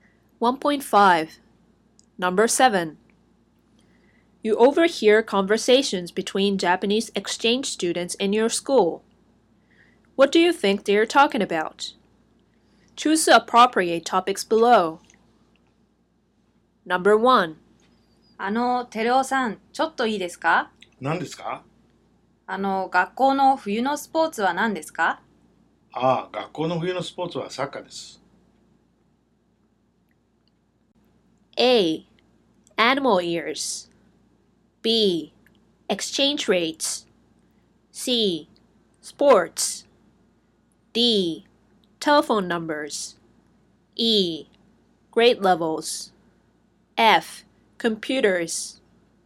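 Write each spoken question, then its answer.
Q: What do you think they are talking about?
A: C: Sports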